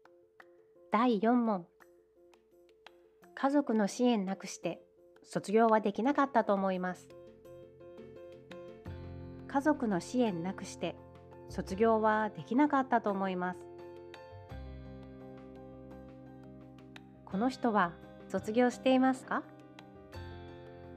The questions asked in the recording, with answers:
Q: この人は卒業していますか?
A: 答えはもう卒業していますね。